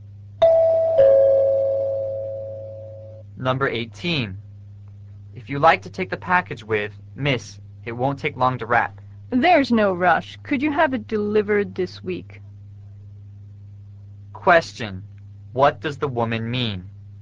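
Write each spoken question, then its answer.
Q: what does the woman mean?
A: She wants the package delivered this week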